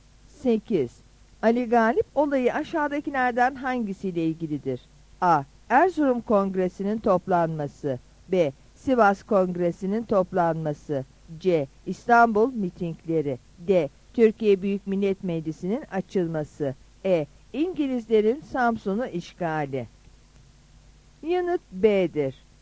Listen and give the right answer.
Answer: Yanıt B'dir.